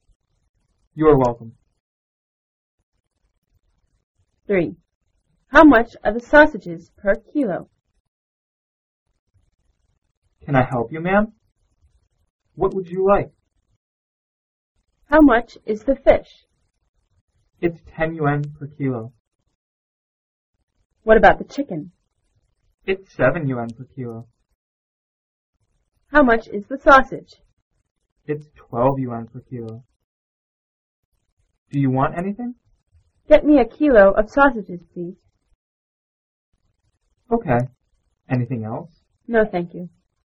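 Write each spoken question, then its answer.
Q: How much are the sausages per kilo?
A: 12 yuan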